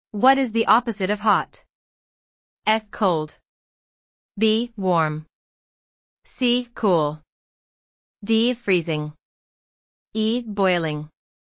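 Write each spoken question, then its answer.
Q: What is the opposite of hot?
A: A: Cold.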